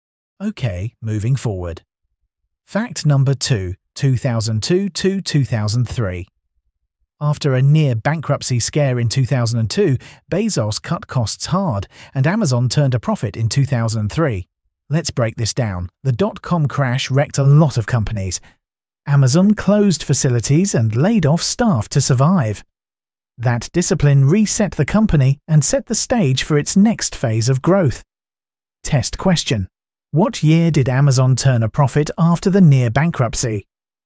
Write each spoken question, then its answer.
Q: What year did Amazon turn a profit after the near bankruptcy?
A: Correct answer. 2003.